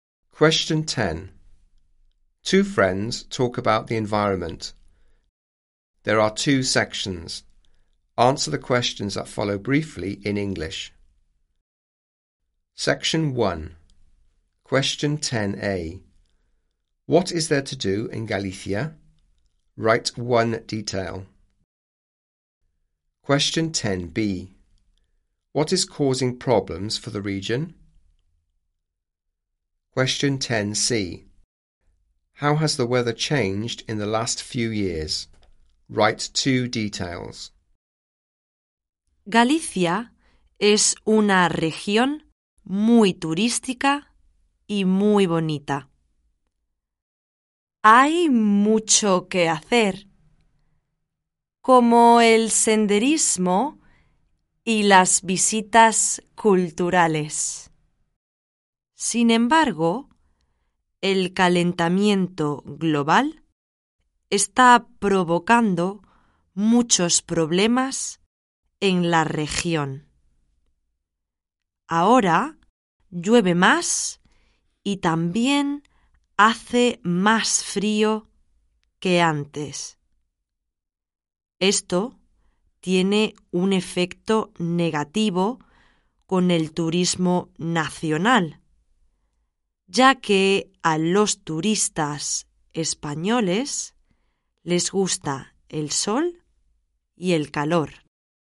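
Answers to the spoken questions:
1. Hiking / cultural visits
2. Global warming
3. It rains more and it is colder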